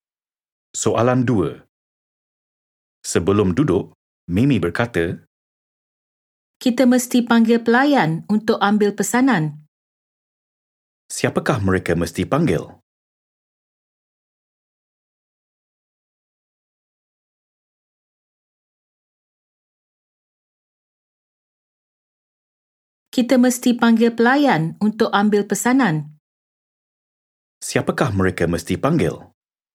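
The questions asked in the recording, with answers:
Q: Siapakah mereka mesti panggil?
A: pelayan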